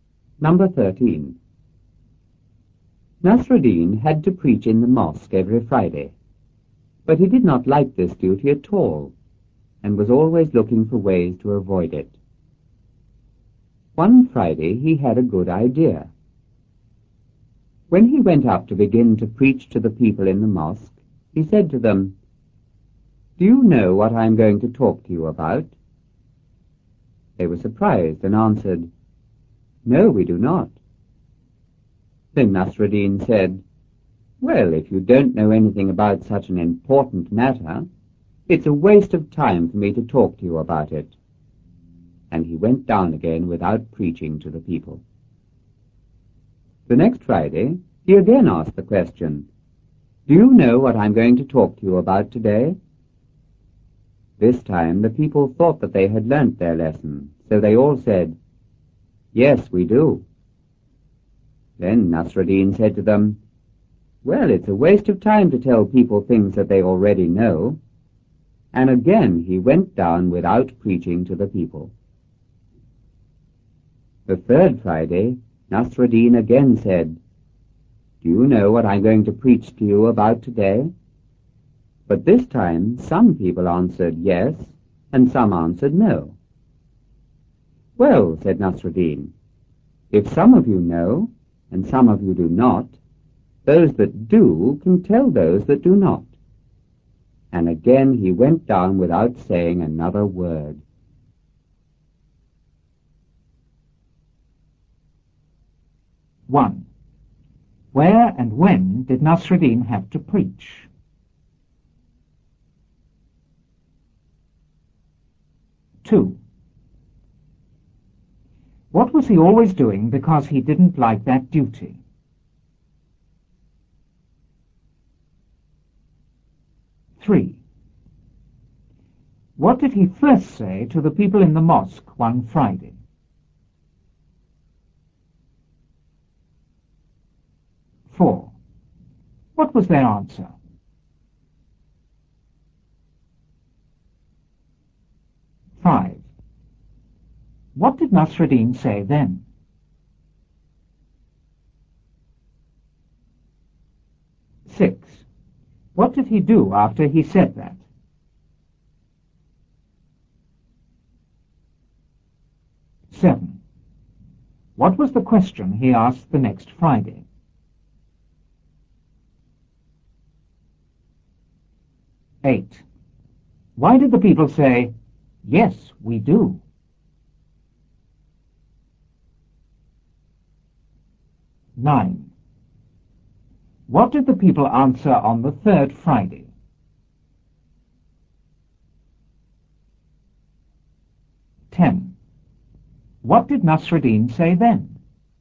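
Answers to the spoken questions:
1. In the mosque every Friday
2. Looking for ways to avoid it
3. "Do you know what I am going to talk to you about?"
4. "No, we do not."
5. If you don't know anything about such an important matter, it's a waste of time for me to talk to you about it.
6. He went down again without preaching
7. "Do you know what I'm going to talk to you about today?"
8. They thought they had learnt their lesson
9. Some answered yes and some answered no
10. Those that know can tell those that do not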